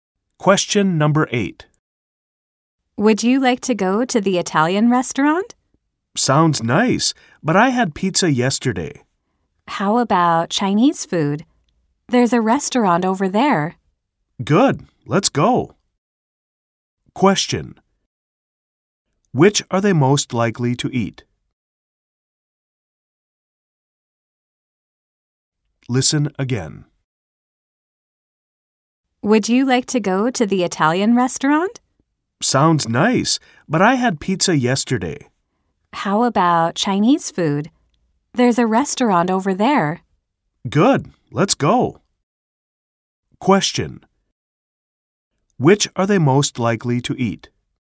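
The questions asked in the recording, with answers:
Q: Question: Which are they most likely to eat?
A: Chinese food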